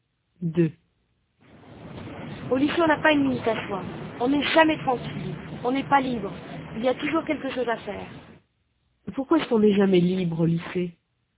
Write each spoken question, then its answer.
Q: Pourquoi est-ce qu'on n'est jamais libre au lycée?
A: Parce qu'il y a toujours quelque chose à faire.